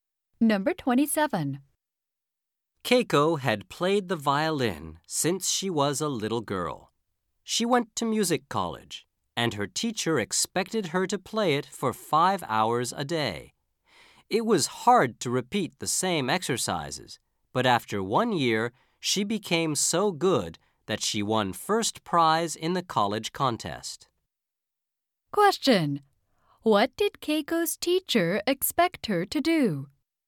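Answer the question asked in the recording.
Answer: Play the violin for 5 hours a day.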